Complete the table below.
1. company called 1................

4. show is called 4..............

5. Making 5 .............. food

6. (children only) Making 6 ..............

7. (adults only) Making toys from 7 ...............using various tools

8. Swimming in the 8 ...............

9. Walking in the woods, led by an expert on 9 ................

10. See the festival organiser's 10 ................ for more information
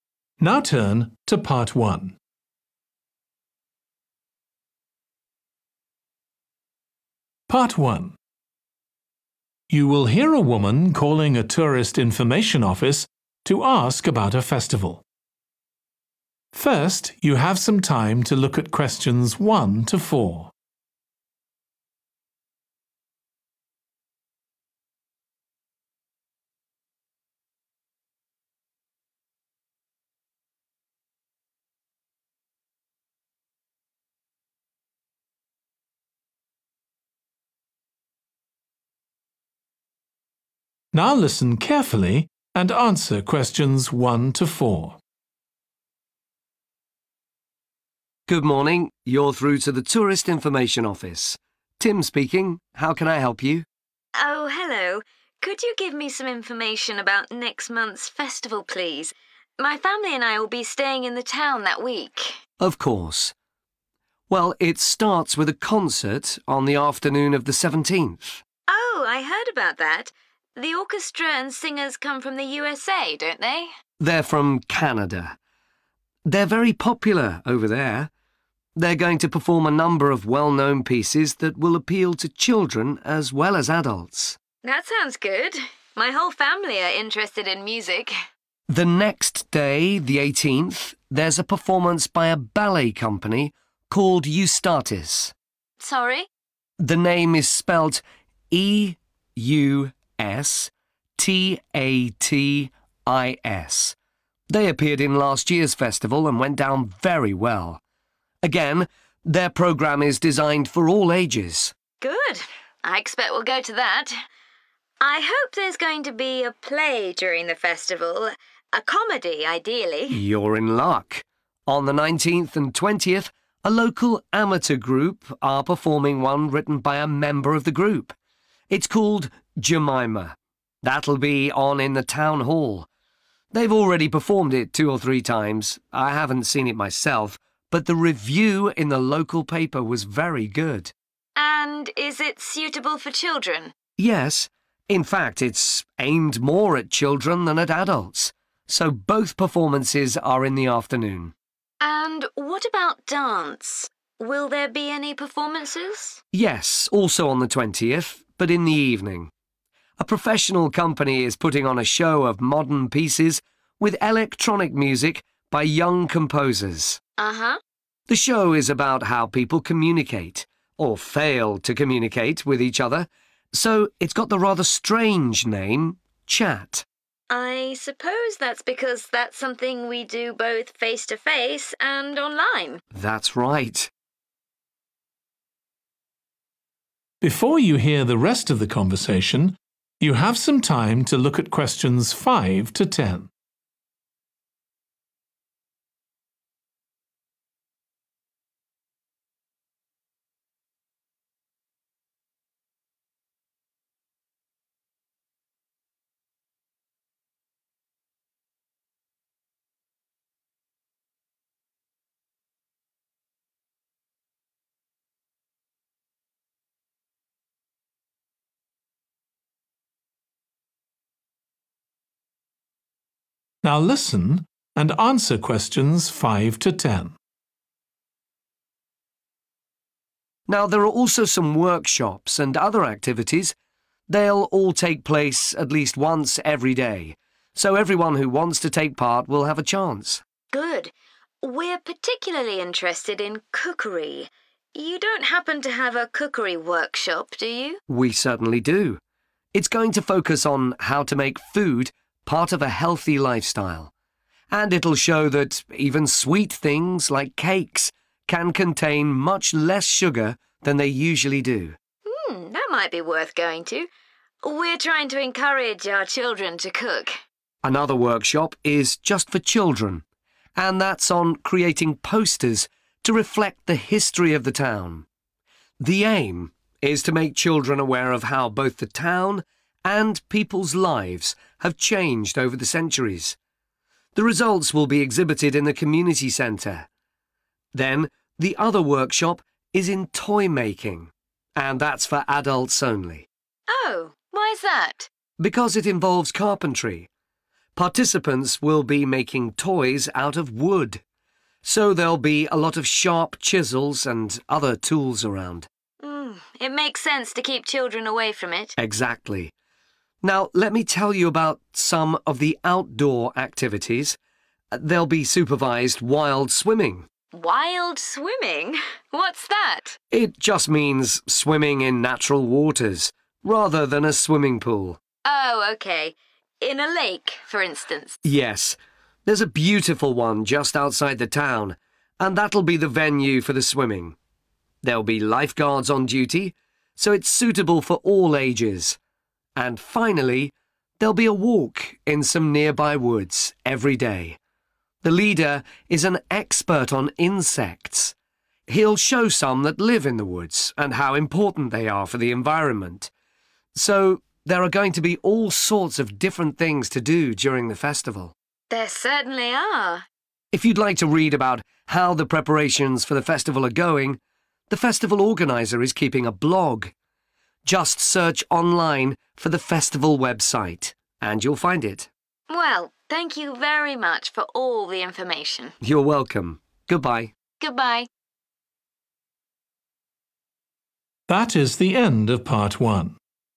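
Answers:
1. Eustatis
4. Chat
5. healthy
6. posters
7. wood
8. lake
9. insects
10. blog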